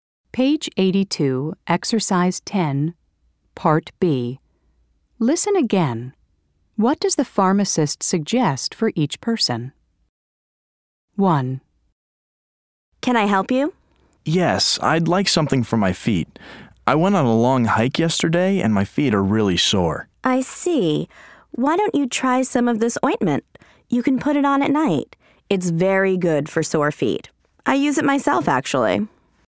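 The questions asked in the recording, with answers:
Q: What does the pharmacist suggest for each person?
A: Ointment for sore feet, put on at night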